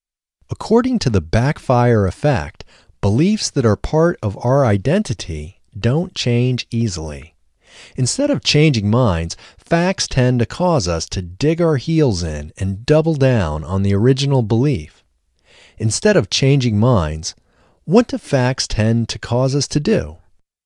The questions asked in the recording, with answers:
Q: Instead of changing minds, what do facts tend to cause us to do?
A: Instead of changing minds, facts tend to cause us to dig our heels in and double down on the original belief.